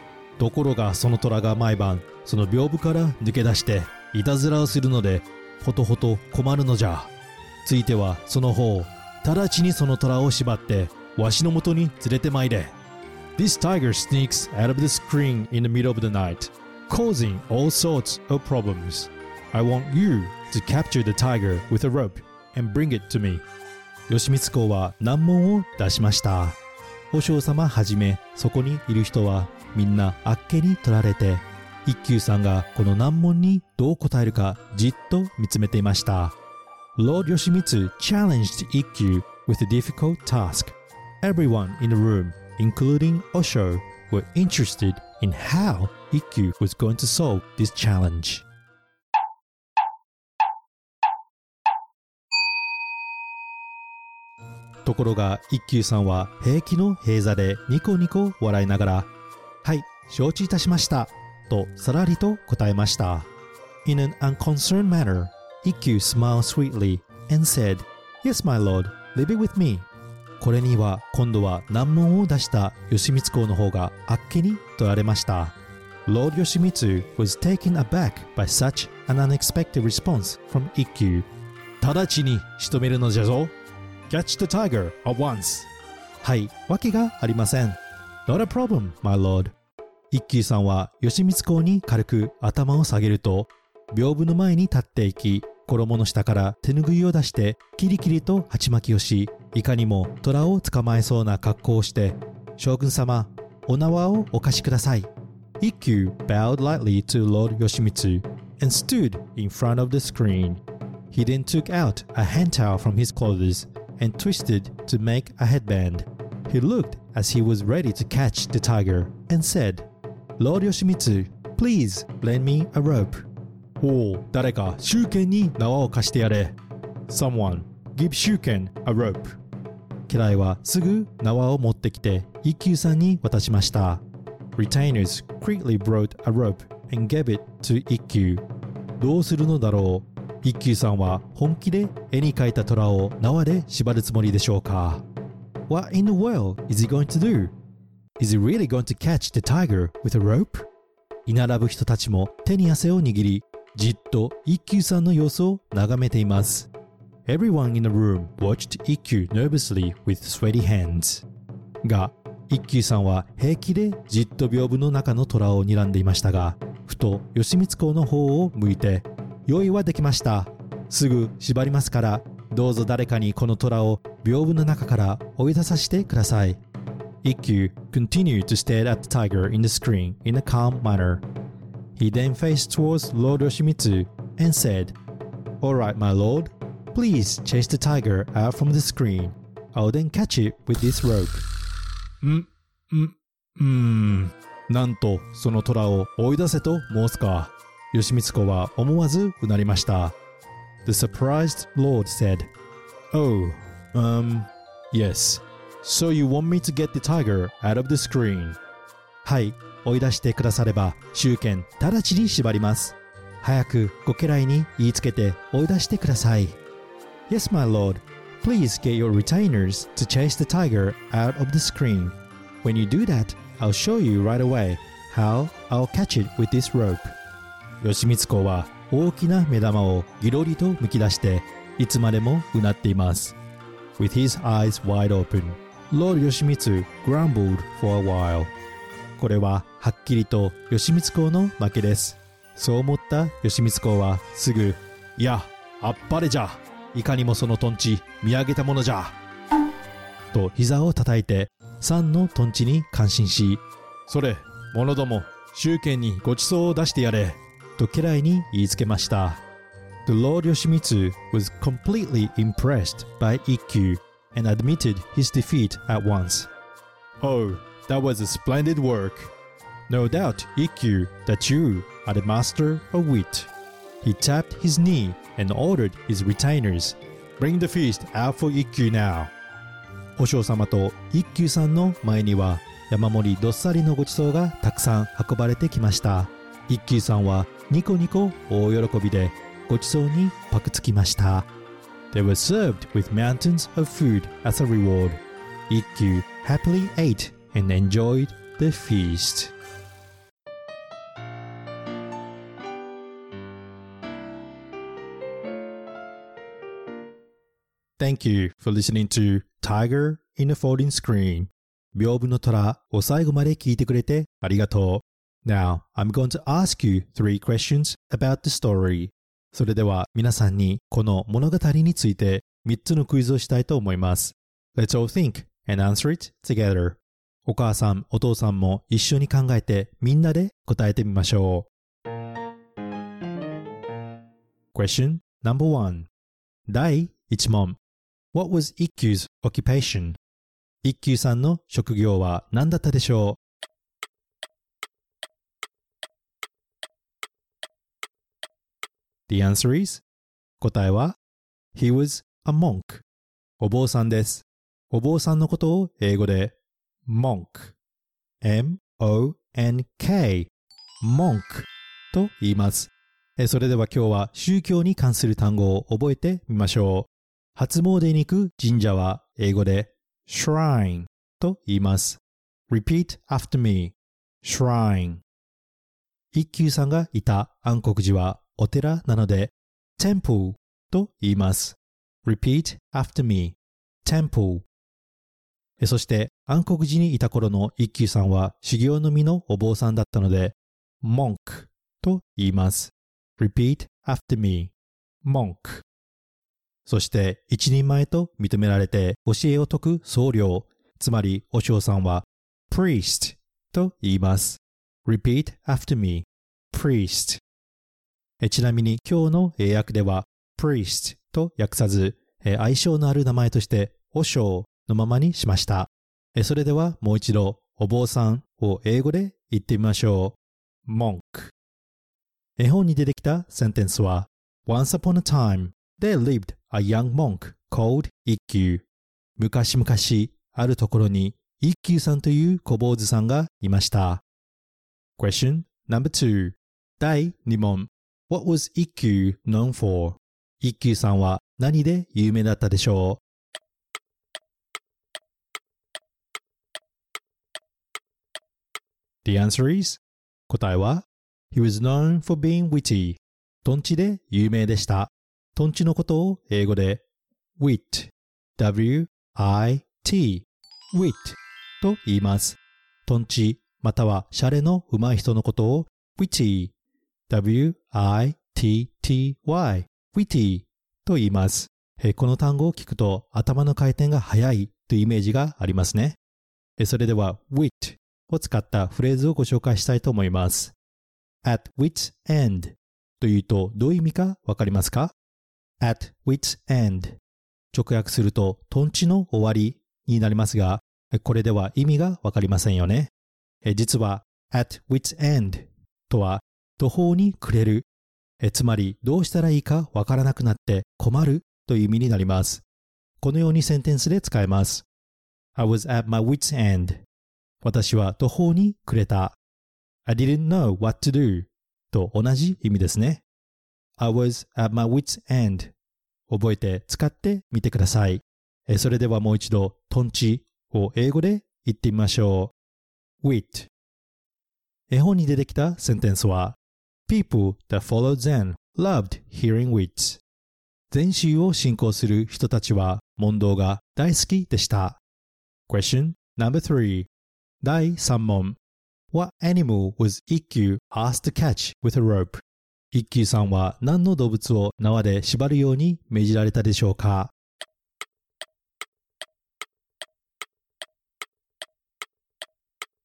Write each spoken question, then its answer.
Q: What animal was IQ asked to catch with a rope?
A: He was asked to catch a tiger